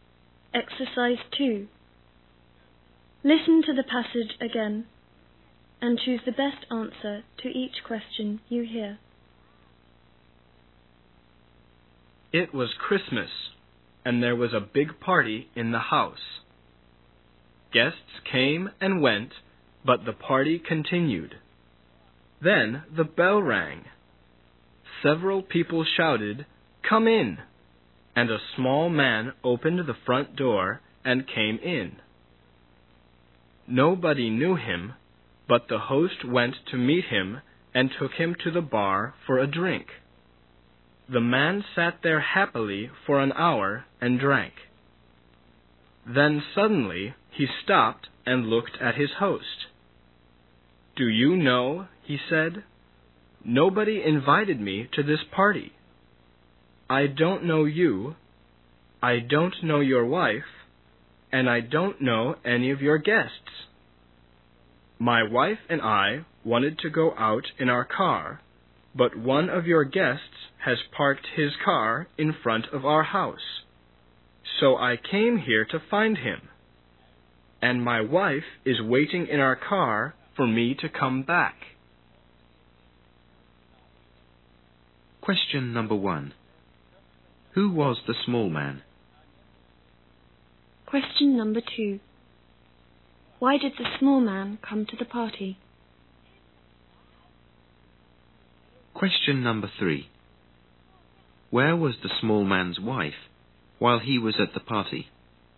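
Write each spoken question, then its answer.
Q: Who was the small man?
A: A stranger nobody knew; a neighbor whose car was blocked

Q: Why did the small man come to the party?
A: To find the guest who parked in front of his house

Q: Where was the small man's wife while he was at the party?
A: Waiting in their car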